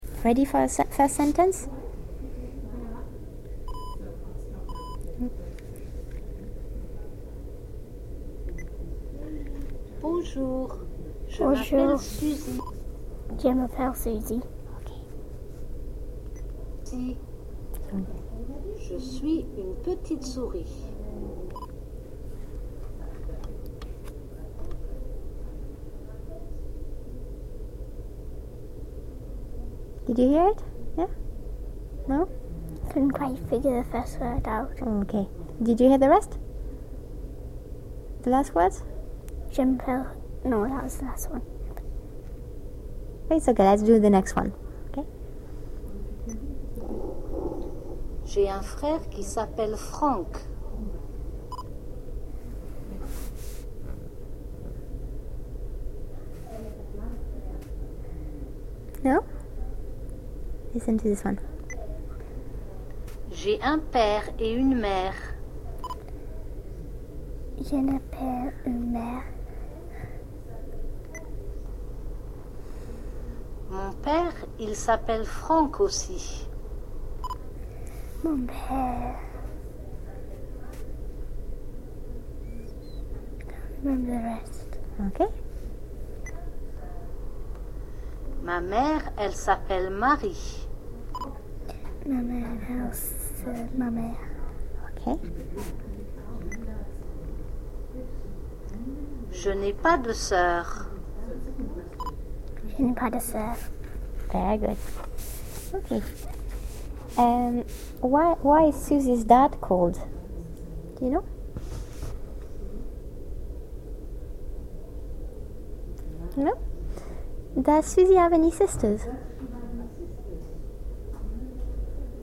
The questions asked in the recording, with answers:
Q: Does Susie have any sisters?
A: She doesn't.